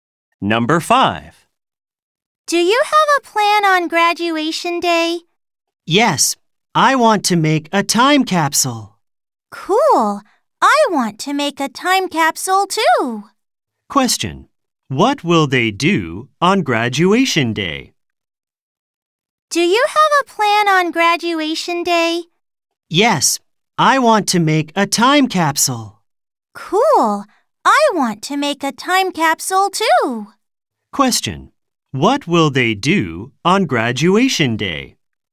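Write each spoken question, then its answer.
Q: What will they do on graduation day?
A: Make a time capsule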